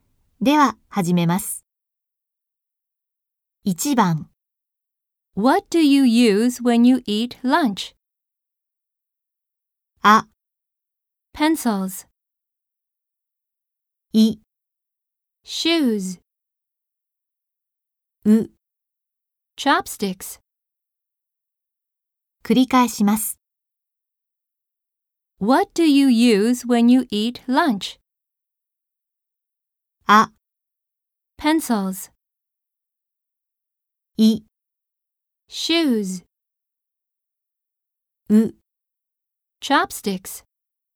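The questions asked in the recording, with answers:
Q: What do you use when you eat lunch?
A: う: Chopsticks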